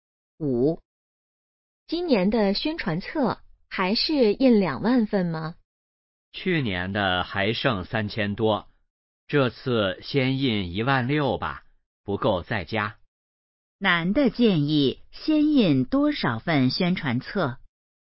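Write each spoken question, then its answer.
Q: 男的建议先印多少份宣传册?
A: 16000份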